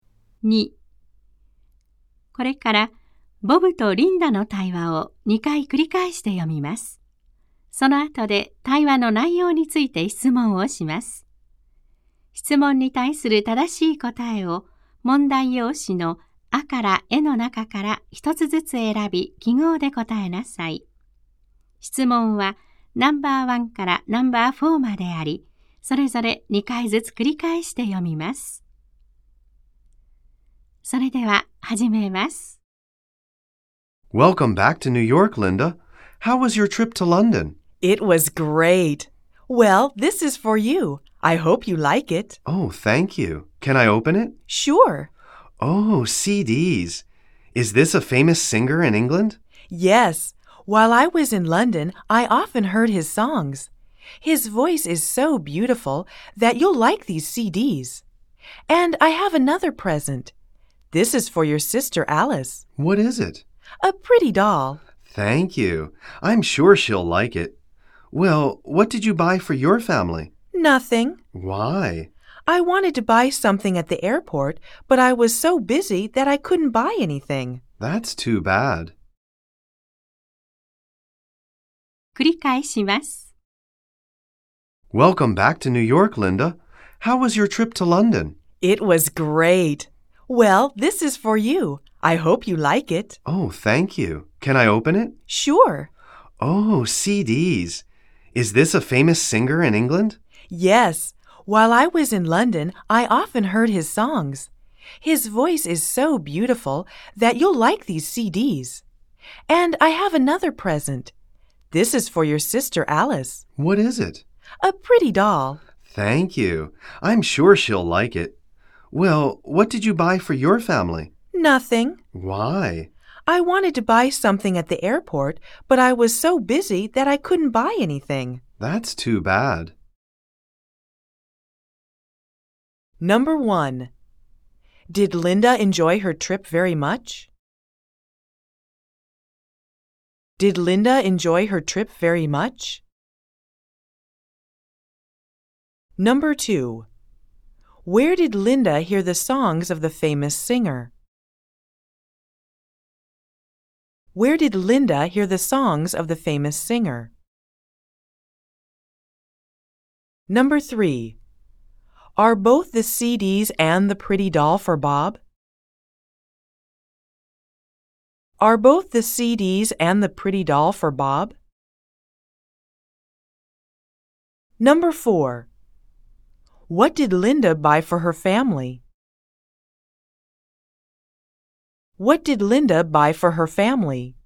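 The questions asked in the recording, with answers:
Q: Did Linda enjoy her trip very much?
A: Yes, she did.

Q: Where did Linda hear the songs of the famous singer?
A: In London.

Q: Are both the CDs and the pretty doll for Bob?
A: No, they aren't. The doll is for Alice.

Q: What did Linda buy for her family?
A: Nothing.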